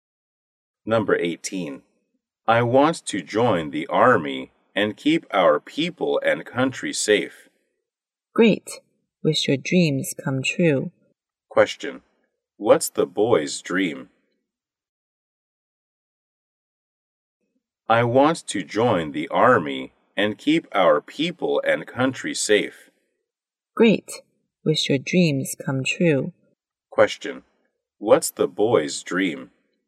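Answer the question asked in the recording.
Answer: To be a soldier.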